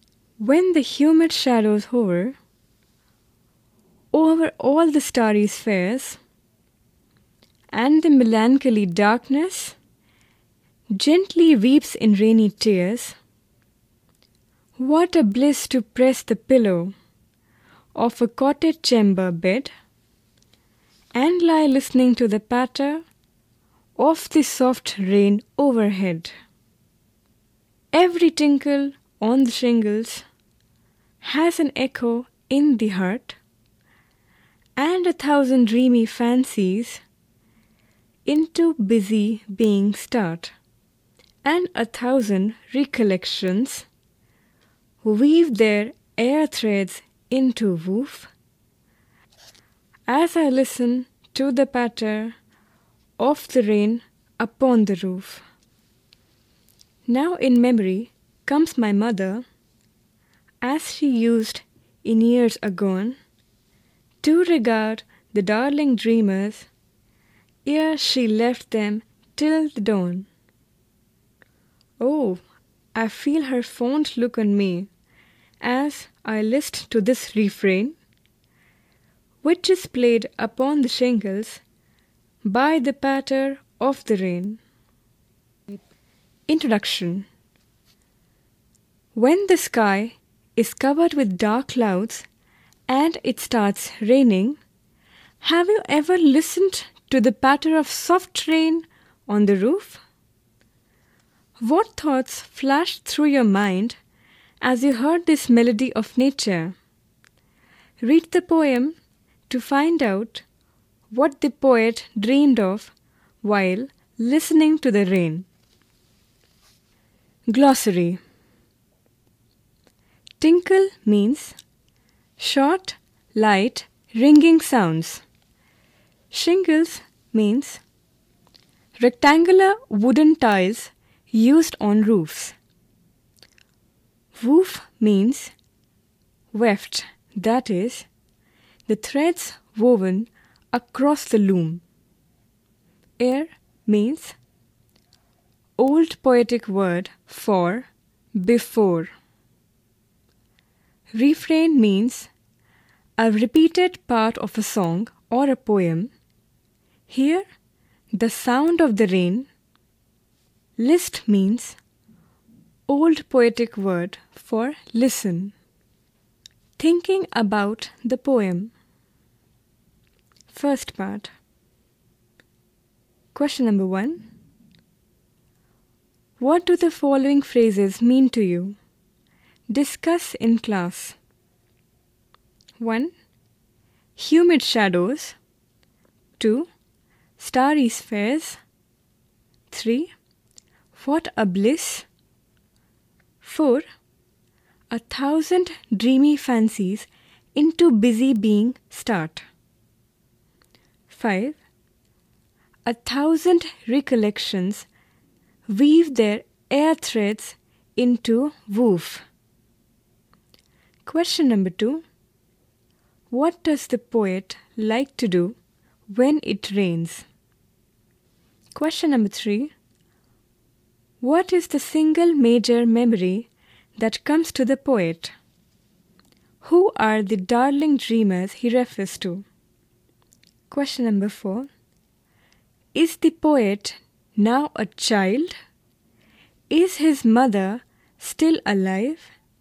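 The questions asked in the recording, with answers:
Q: What does the poet like to do when it rains?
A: Lie in bed in a cottage chamber listening to the patter of the soft rain on the roof

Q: What is the single major memory that comes to the poet?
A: Memory of his mother looking fondly at him and his siblings before leaving them till dawn

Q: Who are the darling dreamers he refers to?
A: The poet and his brothers and sisters as children

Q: Is the poet now a child?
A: No, he is an adult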